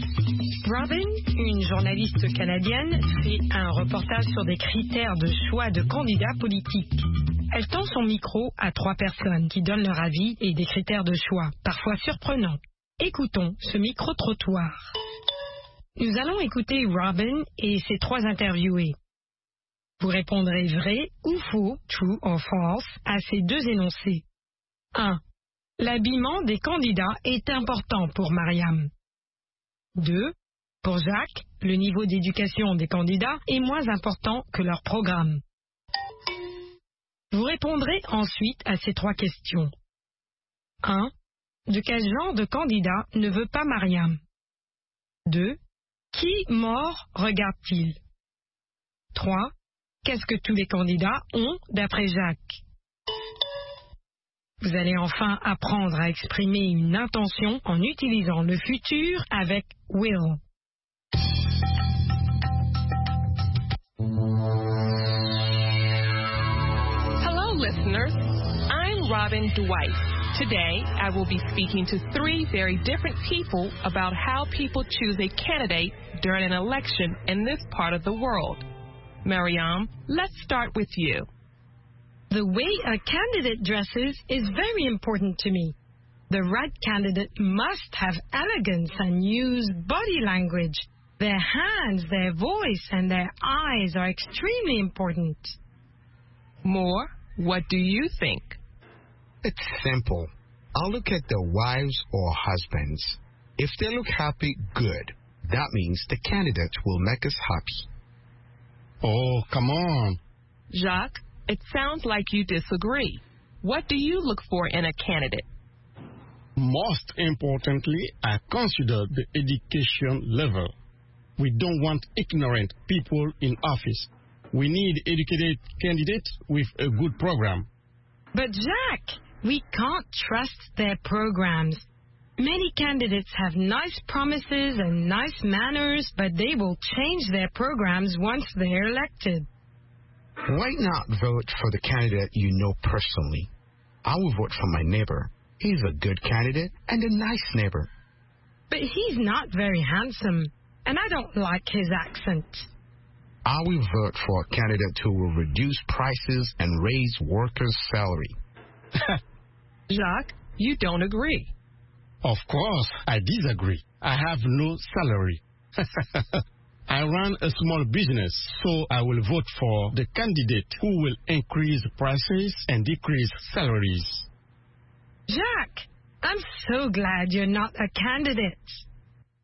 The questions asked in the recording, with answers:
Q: L'habillement des candidats est important pour Mariam.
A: L'énoncé 1 est vrai.

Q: Pour Jacques, le niveau d'éducation des candidats est moins important que leur programme.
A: L'énoncé 2 est faux.

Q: Qui mort regarde-t-il?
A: Les femmes des candidats et les maris des candidates.